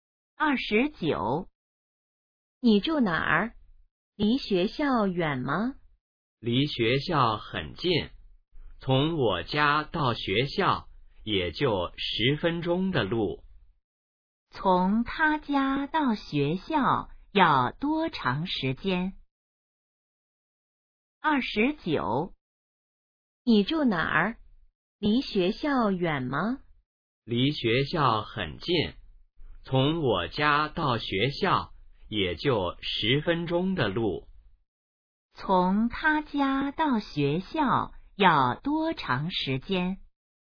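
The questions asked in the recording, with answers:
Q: 从他家到学校要多长时间?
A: 10分钟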